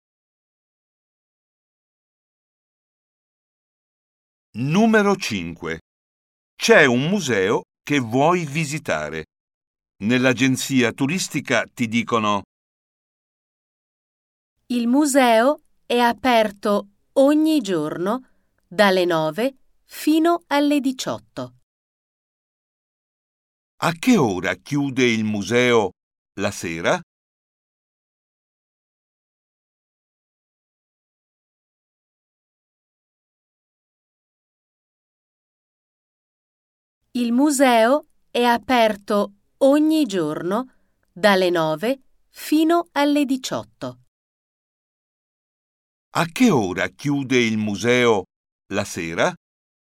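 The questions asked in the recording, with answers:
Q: A che ora chiude il museo la sera?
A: alle 18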